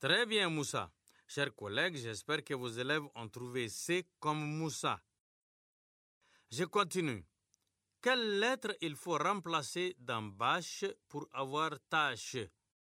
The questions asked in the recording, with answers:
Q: Je continue. Quelle lettre il faut remplacer dans bâche pour avoir tâche?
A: Monsieur, c'est la lettre B.